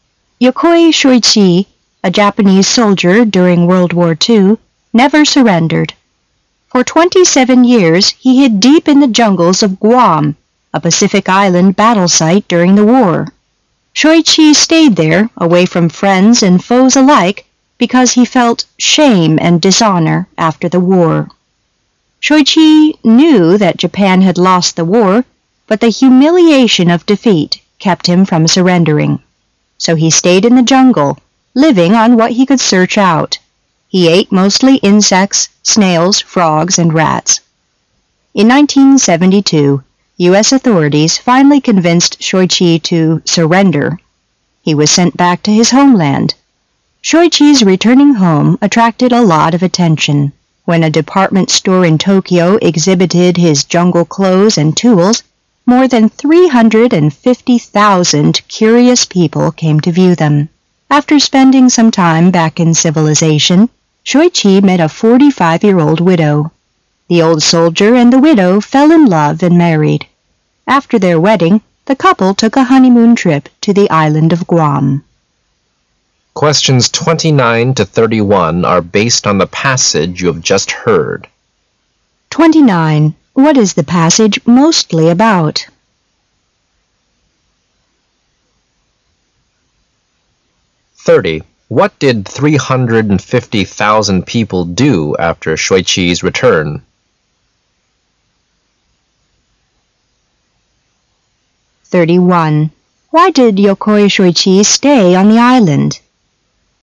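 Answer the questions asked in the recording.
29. A Japanese soldier who hid in the jungle of Guam for 27 years after WWII
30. They came to view his jungle clothes and tools exhibited at a Tokyo department store
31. He felt shame and dishonor over Japan's defeat

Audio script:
[解析] 29-31 Yokoi Shoichi, a Japanese soldier during World War II, never surrendered. For twenty-seven years, he hid deep in the jungles of Guam, a Pacific island battle site during the war. Shoichi stayed there, away from friends and foes alike, because he felt "shame and dishonor" after the war. Shoichi knew that Japan had lost the war, but the humiliation of defeat kept him from surrendering. So he stayed in the jungle, living on what he could search out. He ate mostly insects, snails, flogs and rats. In 1972, U.S. authorities finally convinced Shoichi to "surrender". He was sent back to his homeland. Shoichi's returning home attracted a lot of attention. 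When a department store in Tokyo exhibited his jungle clothes and tools, more than 350,000 curious people came to view them. After spending some time back in civilization, Shoichi met a forty-five years old widow. The old soldier and the widow fell in love and married. After their wedding, the couple took a honeymoon trip to the island of Guam.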